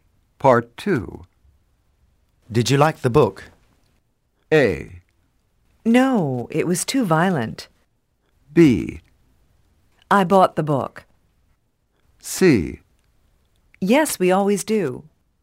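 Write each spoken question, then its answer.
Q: Did you like the book?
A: A: No, it was too violent.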